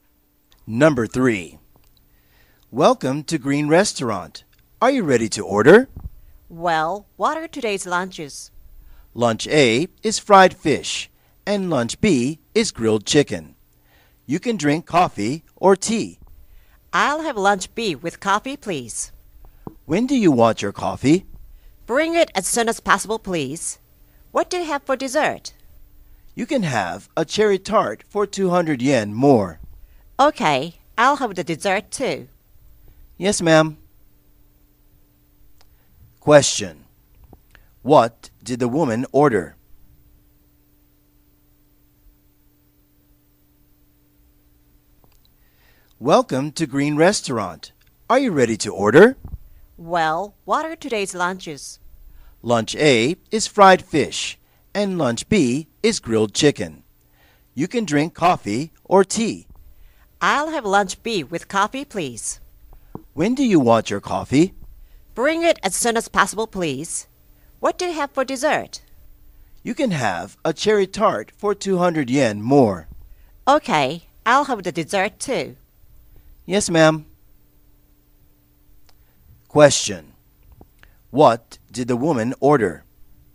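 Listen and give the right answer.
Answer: Lunch B (grilled chicken) with coffee and a cherry tart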